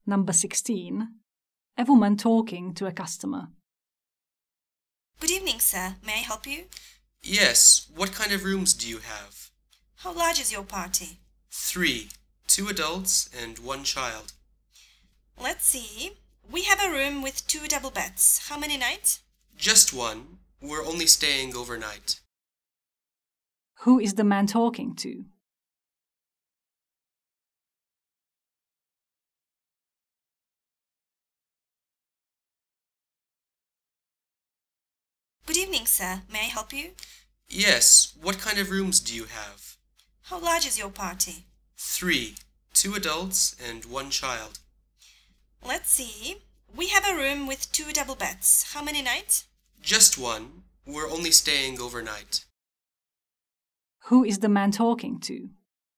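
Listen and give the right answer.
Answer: A hotel receptionist (desk clerk)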